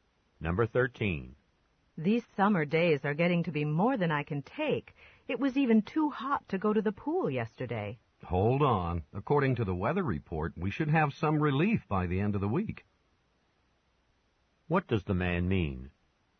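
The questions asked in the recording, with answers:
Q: What does the man mean?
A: It should get cooler by the end of the week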